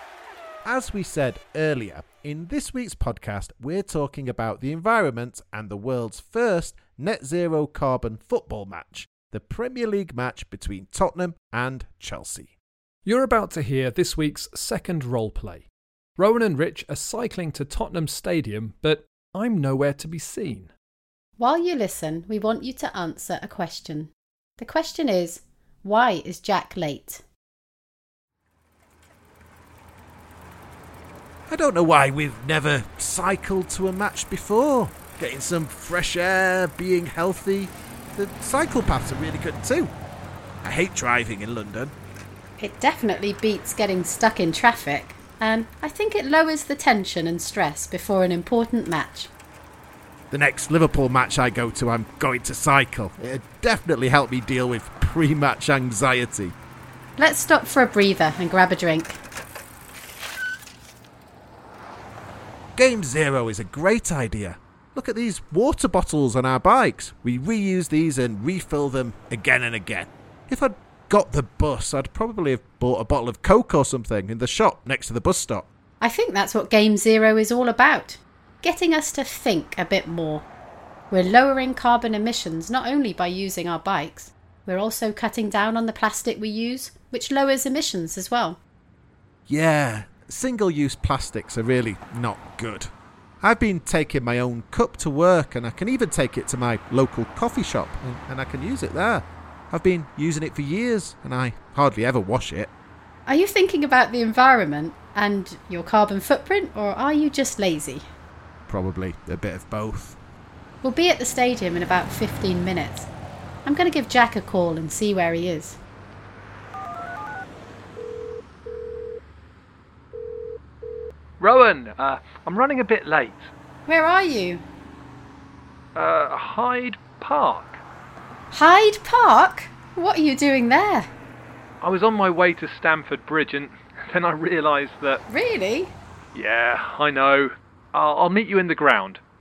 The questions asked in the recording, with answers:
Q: why is Jack late?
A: I went the wrong way. Well, I didn't think I was going the wrong way because I thought the match was at Chelsea Stadium.